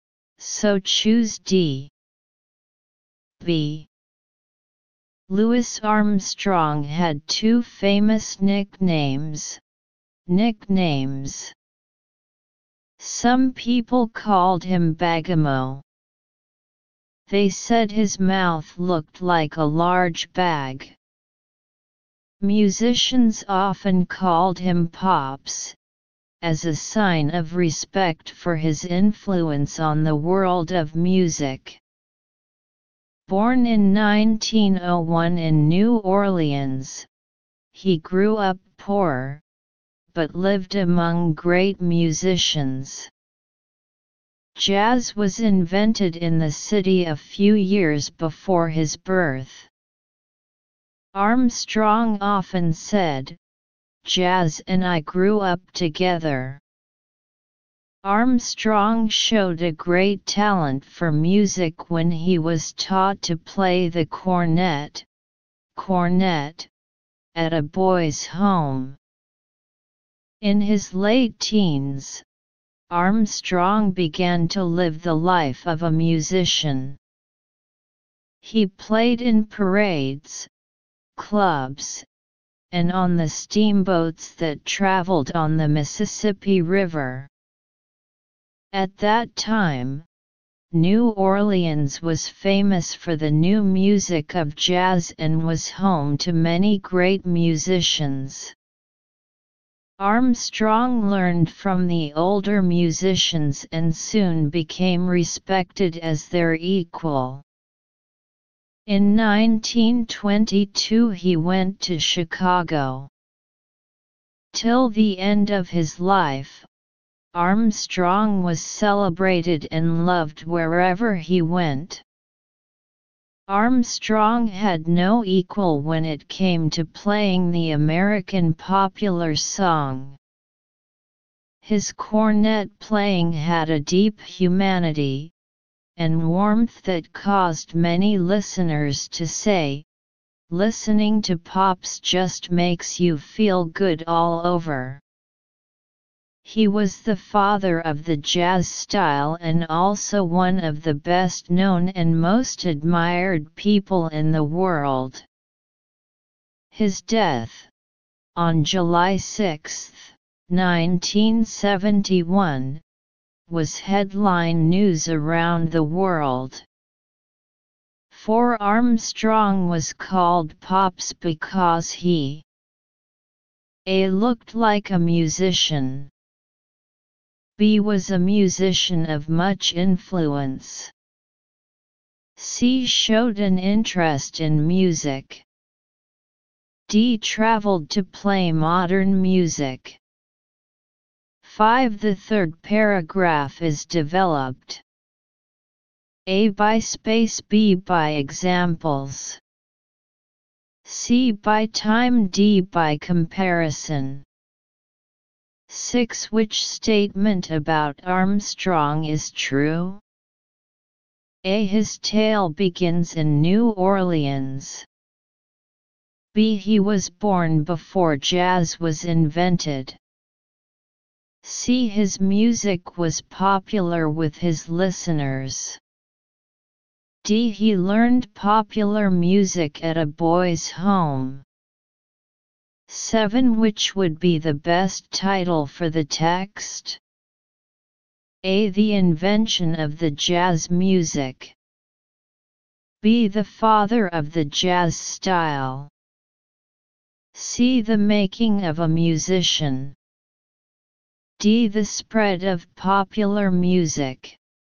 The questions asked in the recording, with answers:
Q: For Armstrong was called Pops because he A looked like a musician.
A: Answer 4. B

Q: The third paragraph is developed.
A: 5. C

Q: Which statement about Armstrong is true?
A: 6. C

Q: Which would be the best title for the text?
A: 7 B